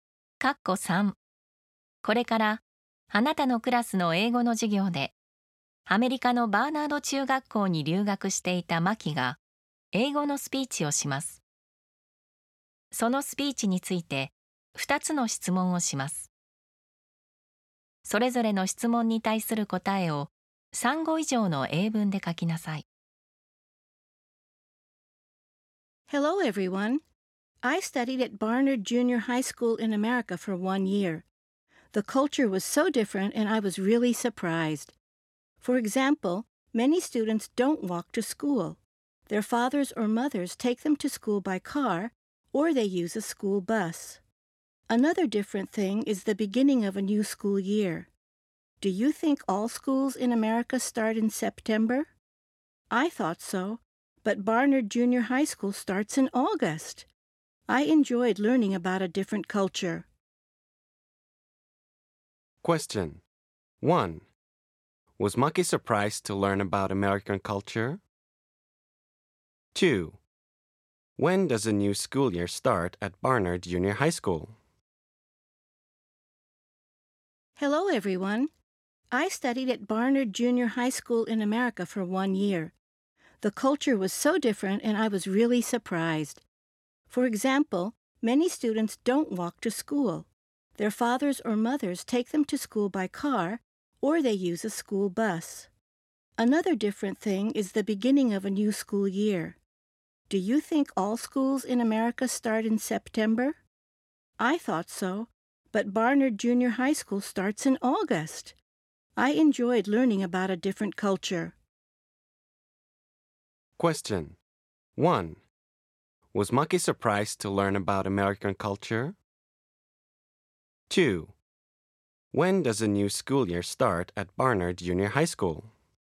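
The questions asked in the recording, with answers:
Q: Was Maki surprised to learn about American culture?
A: Yes, she was.

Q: When does a new school year start at Barnard Junior High School?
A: It starts in August.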